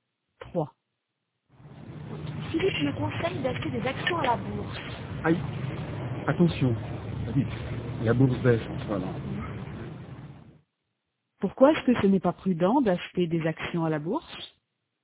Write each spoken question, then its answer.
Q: Pourquoi est-ce que ce n'est pas prudent d'acheter des actions à la bourse?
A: Parce que la bourse baisse en ce moment.